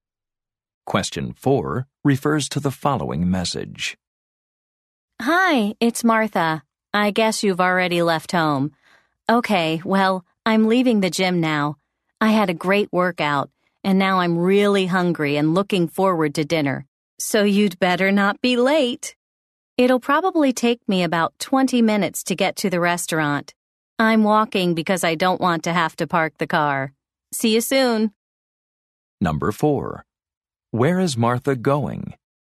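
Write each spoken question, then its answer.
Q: Where is Martha going?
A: To a restaurant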